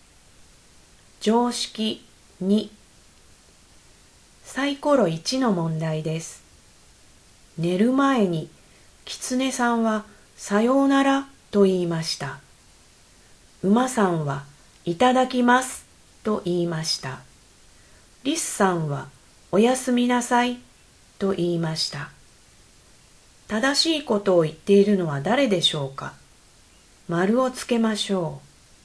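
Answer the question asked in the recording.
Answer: リスさん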